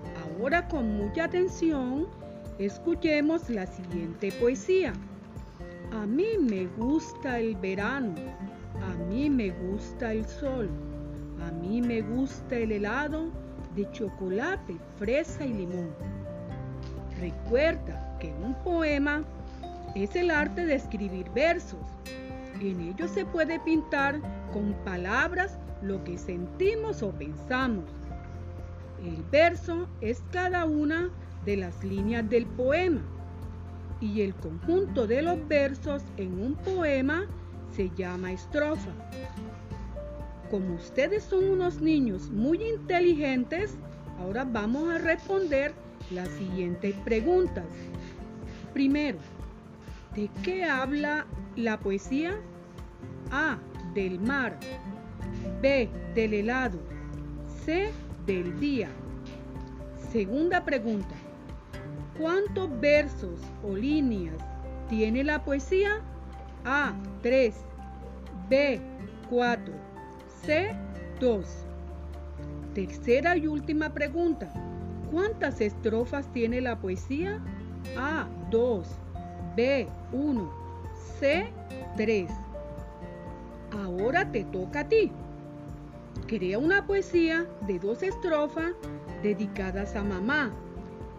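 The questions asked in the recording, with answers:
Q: ¿Cuántas estrofas tiene la poesía?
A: B: 1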